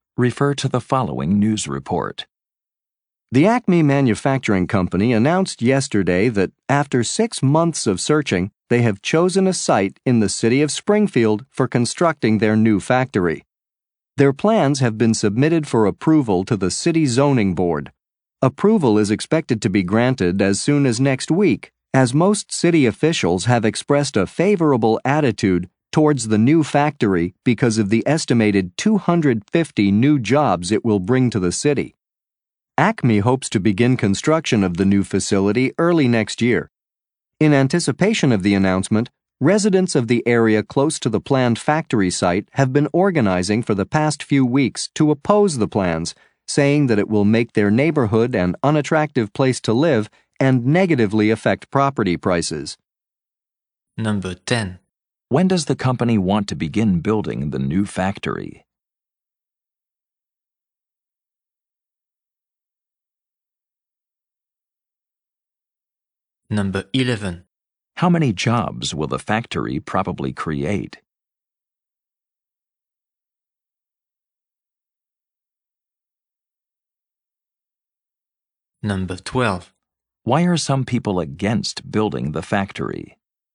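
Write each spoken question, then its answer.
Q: When does the company want to begin building the new factory?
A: Early next year

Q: How many jobs will the factory probably create?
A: About 250

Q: Why are some people against building the factory?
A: They think it will make their neighborhood an unattractive place to live and lower property prices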